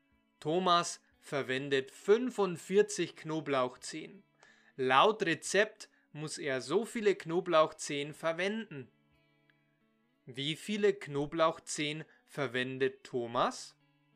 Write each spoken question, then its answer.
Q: Wie viele Knoblauchzehen verwendet Thomas?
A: 45. Er verwendet 45 Knoblauchzehen.